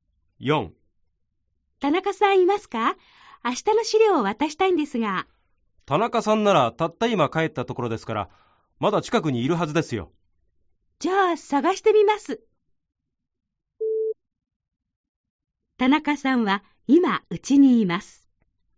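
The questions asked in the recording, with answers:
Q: 田中さんは今うちにいます。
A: ×(まだ会社の近くにいる)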